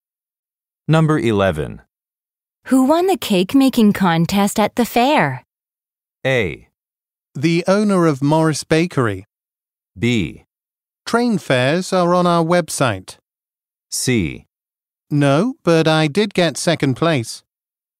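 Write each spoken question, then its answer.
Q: Who won the cake-making contest at the fair?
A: A: The owner of Morris Bakery.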